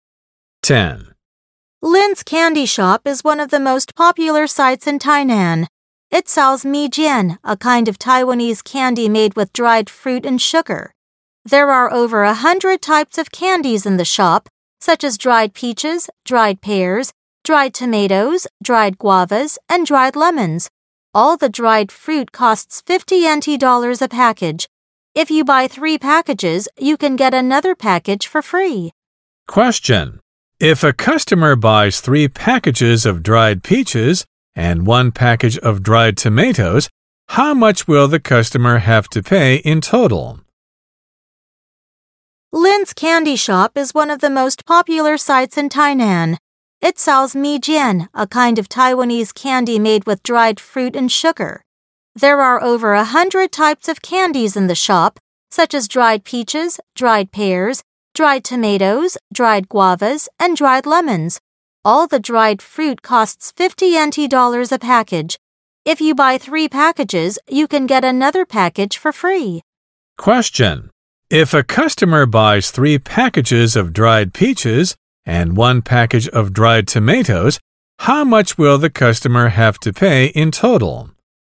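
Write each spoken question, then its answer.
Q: if a customer buys 3 packages of dried peaches and 1 package of dried tomatoes, how much will the customer have to pay in total?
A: NT$150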